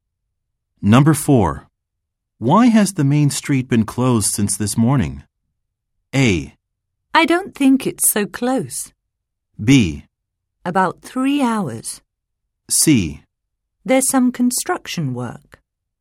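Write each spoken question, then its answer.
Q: Why has the main street been closed since this morning?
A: C: There's some construction work.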